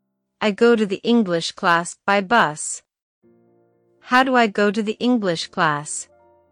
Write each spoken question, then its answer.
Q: How do I go to the English class?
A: By bus. I take the bus to the English class.